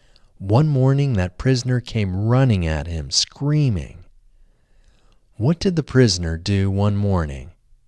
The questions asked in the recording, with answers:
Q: What did the prisoner do one morning?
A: The prisoner came running at him, screaming, one morning.